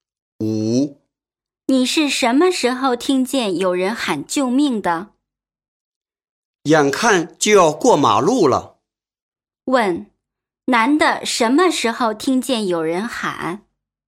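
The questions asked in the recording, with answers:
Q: 男的什么时候听见有人喊?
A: 快要过马路的时候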